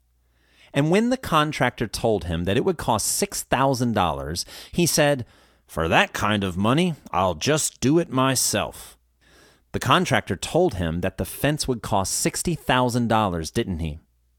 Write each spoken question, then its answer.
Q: The contractor told him that the fence would cost $60,000, didn't he?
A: No, that's not correct. He told him it would cost $6,000, not $60,000.